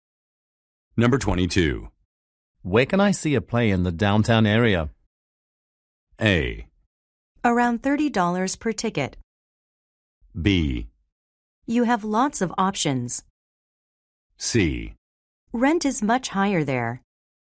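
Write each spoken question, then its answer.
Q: Where can I see a play in the downtown area?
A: B: You have lots of options.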